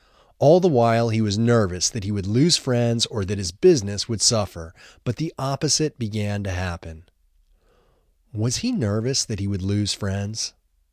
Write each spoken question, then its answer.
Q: Was he nervous that he would lose friends?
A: Yes, he was nervous he would lose friends.